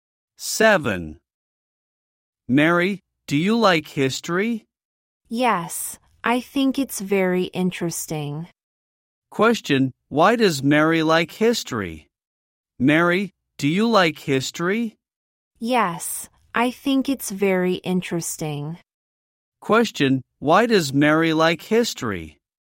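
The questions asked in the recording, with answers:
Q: Question, why does Mary like history?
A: Because she thinks it's very interesting.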